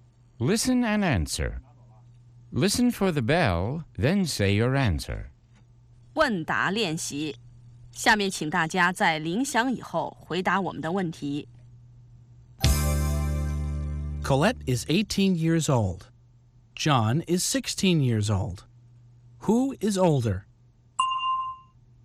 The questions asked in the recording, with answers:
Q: Who is older?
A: Colette is. Colette is older than John.